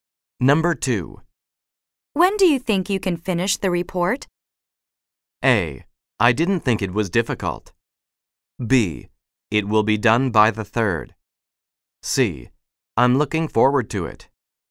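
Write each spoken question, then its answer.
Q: When do you think you can finish the report?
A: B: It will be done by the 3rd.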